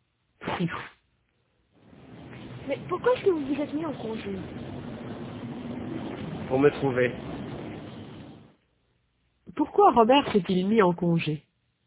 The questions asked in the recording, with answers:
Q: Pourquoi Robert s'est-il mis en congé?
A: Pour se trouver.